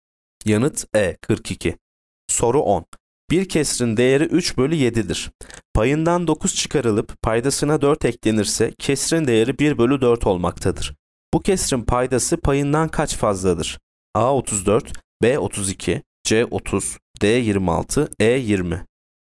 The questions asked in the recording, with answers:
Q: Bu kesrin paydası payından kaç fazladır?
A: Yanıt B 32.